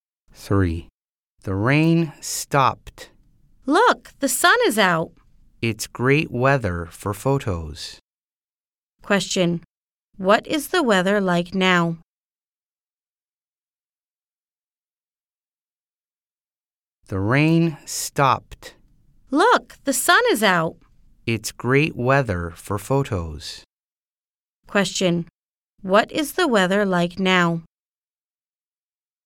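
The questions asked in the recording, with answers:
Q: What is the weather like now?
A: It's sunny.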